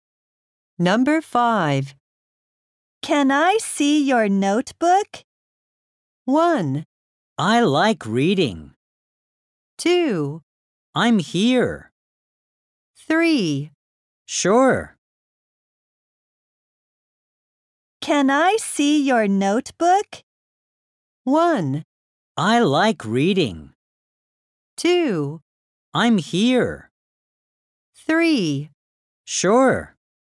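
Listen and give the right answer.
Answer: 3: Sure.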